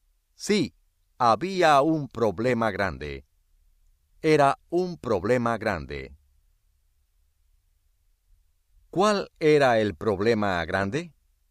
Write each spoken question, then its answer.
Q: ¿Cuál era el problema grande?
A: Ana no quería ir a la escuela.